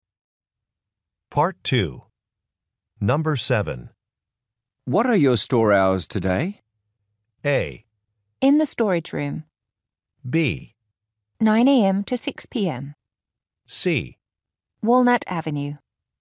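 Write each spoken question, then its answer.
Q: What are your store hours today?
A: B: 9 a.m. to 6 p.m.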